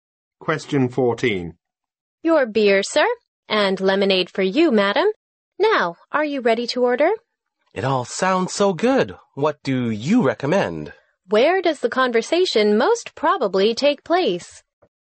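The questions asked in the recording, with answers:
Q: Where does the conversation most probably take place?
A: In a restaurant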